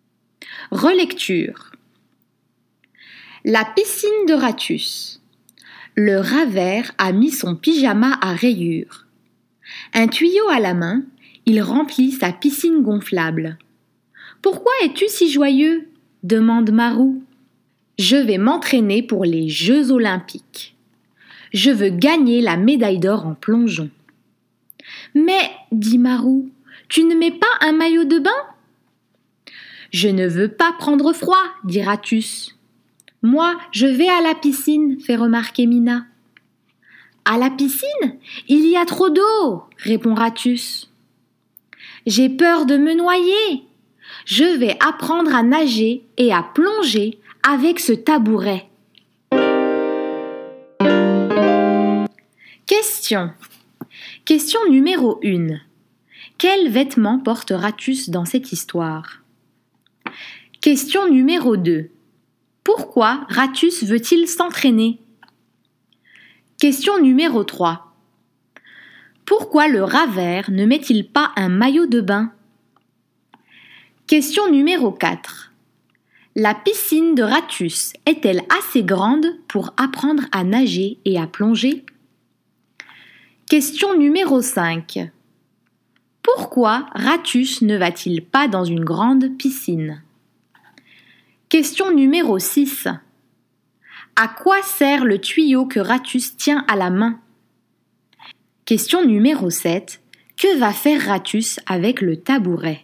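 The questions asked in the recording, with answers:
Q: Quel vêtement porte Ratus dans cette histoire ?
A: son pyjama à rayures

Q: Pourquoi Ratus veut-il s'entraîner ?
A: pour les Jeux Olympiques, gagner la médaille d'or en plongeon

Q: Pourquoi le rat vert ne met-il pas un maillot de bain ?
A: il ne veut pas prendre froid

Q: Pourquoi Ratus ne va-t-il pas dans une grande piscine ?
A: il y a trop d'eau, il a peur de se noyer

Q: À quoi sert le tuyau que Ratus tient à la main ?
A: à remplir sa piscine gonflable

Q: Que va faire Ratus avec le tabouret ?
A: apprendre à nager et à plonger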